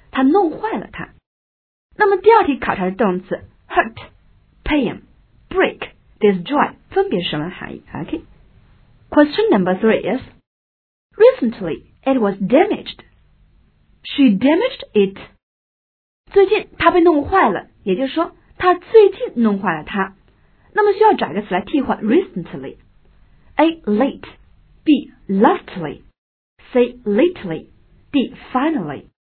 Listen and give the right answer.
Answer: 只有 C lately 相当于最近的含义